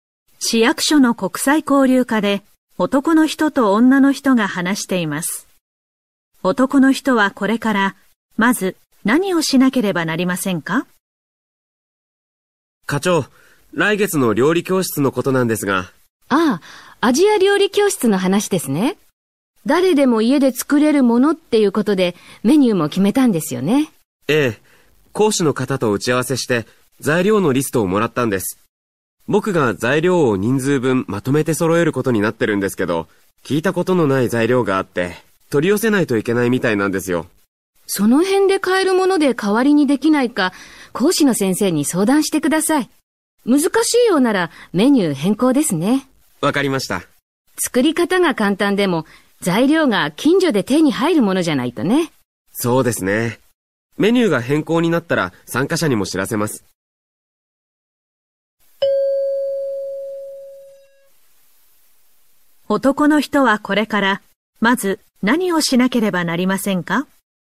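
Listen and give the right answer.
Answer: 近所で買える材料で代わりにできないか講師の先生に相談する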